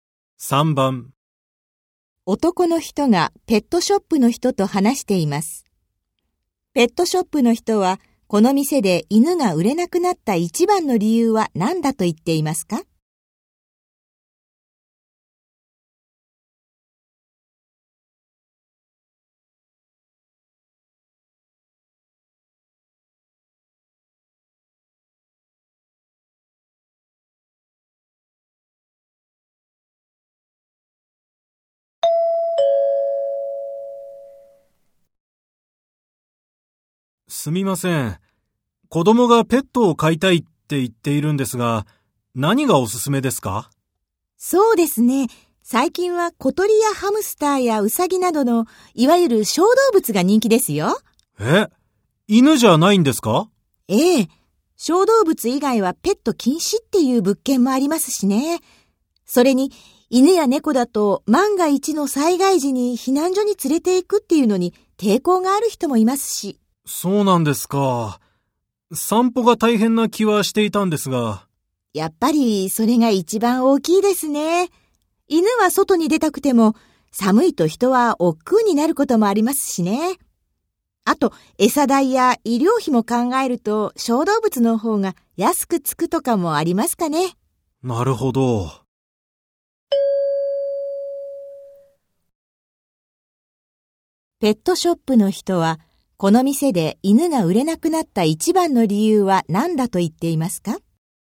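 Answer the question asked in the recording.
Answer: 散歩が大変だから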